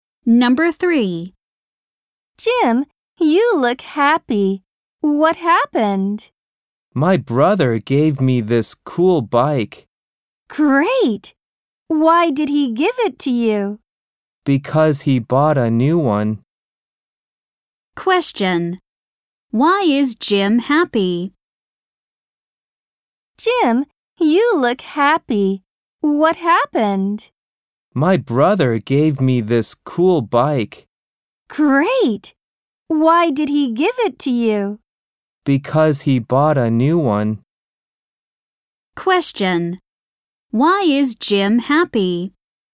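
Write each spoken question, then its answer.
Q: Why is Jim happy?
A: His brother gave him a cool bike.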